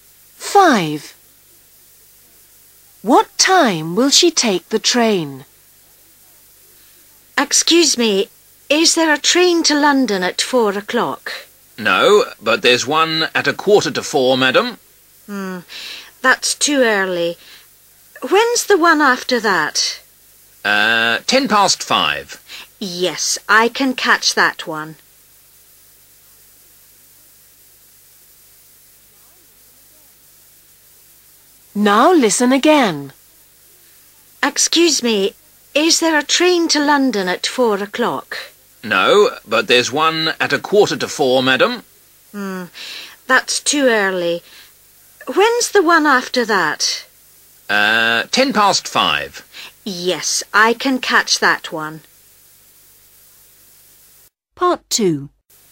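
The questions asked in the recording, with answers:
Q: What time will she take the train?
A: 5:10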